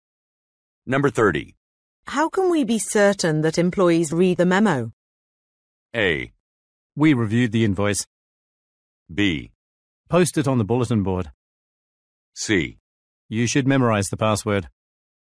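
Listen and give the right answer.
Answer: B: Post it on the bulletin board.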